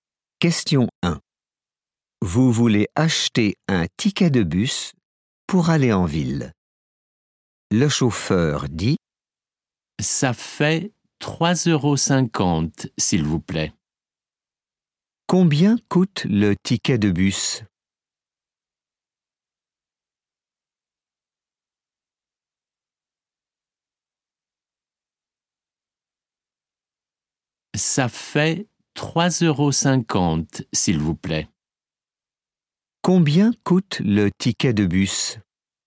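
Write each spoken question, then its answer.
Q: Combien coûte le ticket de bus ?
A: 3,50 €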